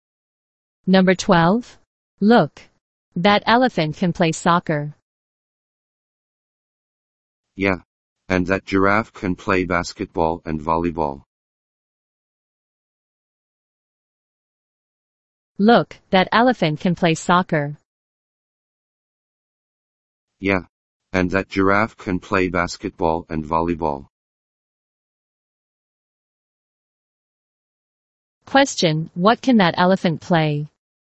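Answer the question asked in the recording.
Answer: Soccer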